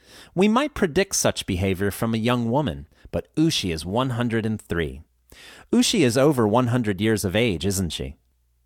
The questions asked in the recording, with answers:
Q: Ushi is over 100 years of age, isn't she?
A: Yes, that's right. She's 103 years old.